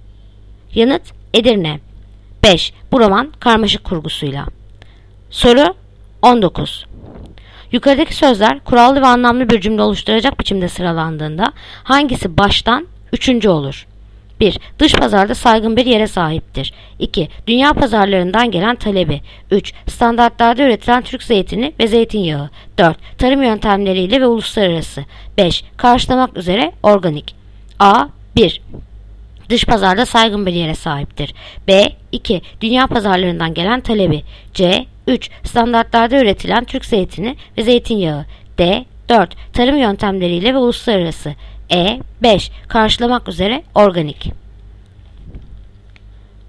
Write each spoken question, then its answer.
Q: Yukarıdaki sözler kurallı ve anlamlı bir cümle oluşturacak biçimde sıralandığında hangisi baştan üçüncü olur?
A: Yanıt Diyarbakır. 4. Tarım yöntemleriyle ve uluslararası.